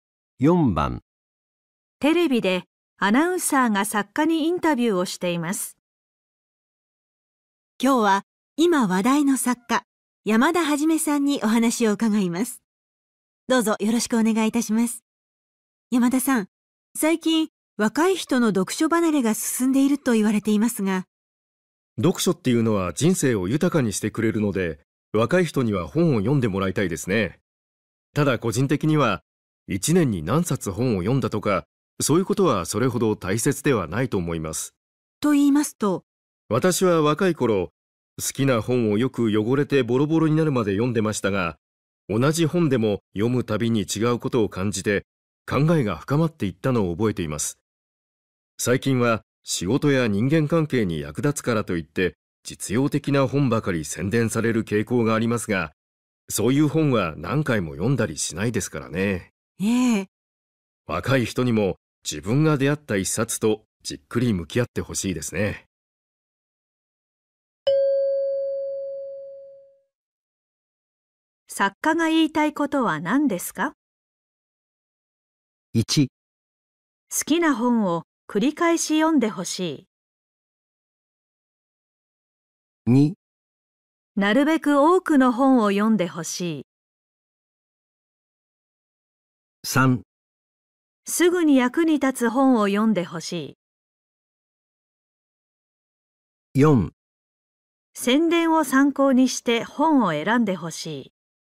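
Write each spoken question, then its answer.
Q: 作家が言いたいことは何ですか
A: 1: 好きな本を繰り返し読んでほしい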